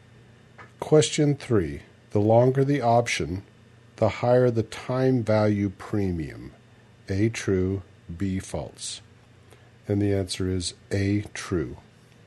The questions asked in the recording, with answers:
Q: The longer the option, the higher the time value premium.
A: And the answer is A, true.